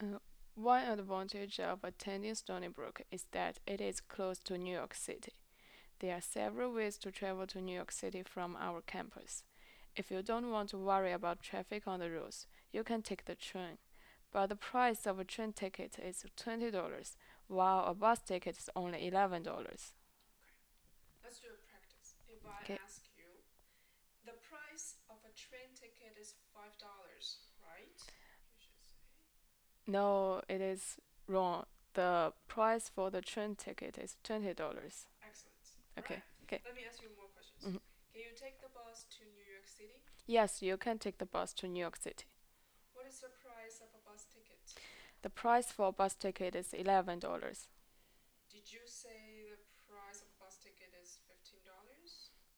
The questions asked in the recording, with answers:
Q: Did you say the price of a bus ticket is $15?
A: No, I didn't say the bus ticket for it's $15.